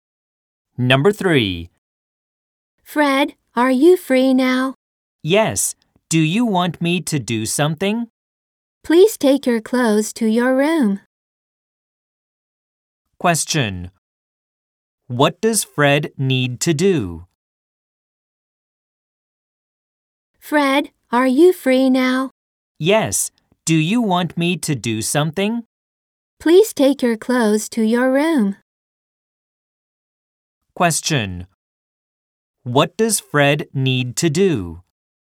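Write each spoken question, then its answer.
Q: What does Fred need to do?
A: Take his clothes to his room.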